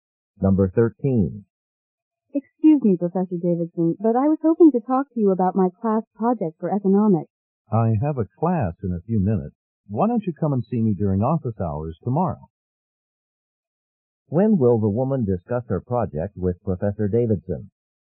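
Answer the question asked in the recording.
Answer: Tomorrow during his office hours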